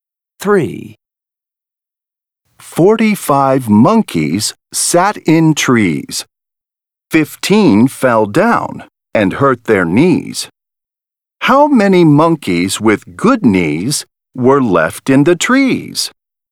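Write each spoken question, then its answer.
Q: How many monkeys with good knees were left in the trees?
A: 30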